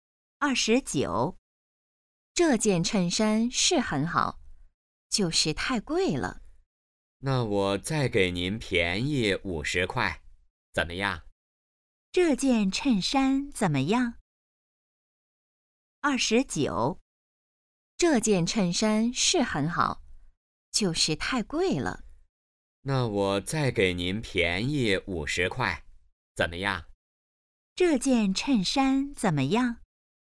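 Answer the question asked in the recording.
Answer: 很好,但是太贵了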